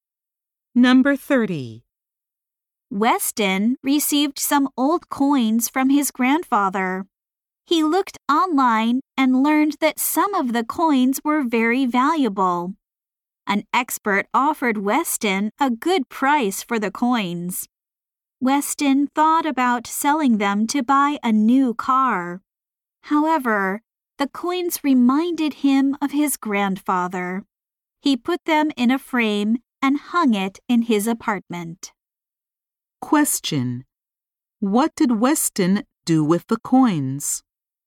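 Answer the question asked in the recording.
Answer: He put them in a frame and hung it in his apartment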